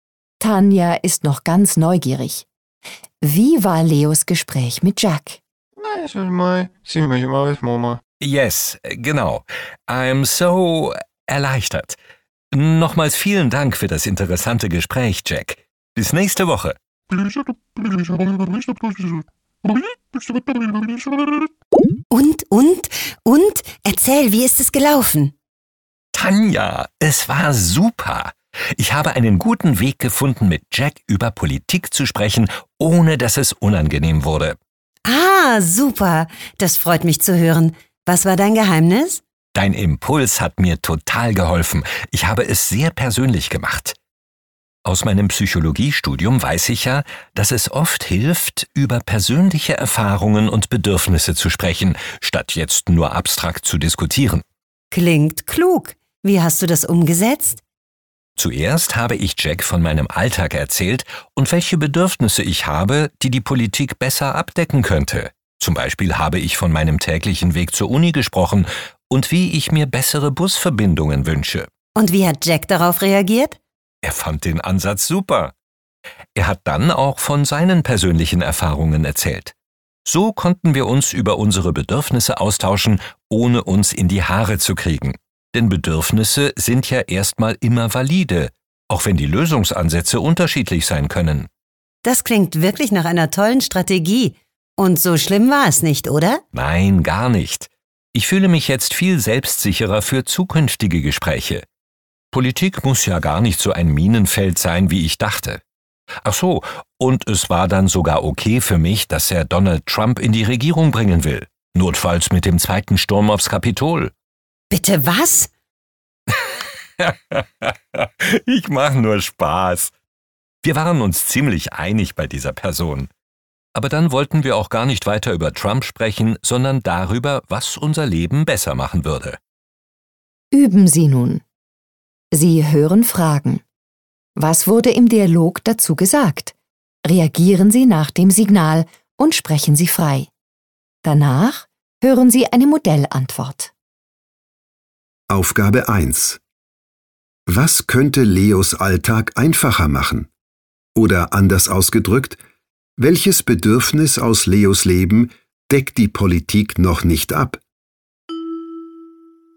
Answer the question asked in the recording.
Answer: Leo hat von seinem täglichen Weg zur Uni gesprochen und wie er sich bessere Busverbindungen wünscht.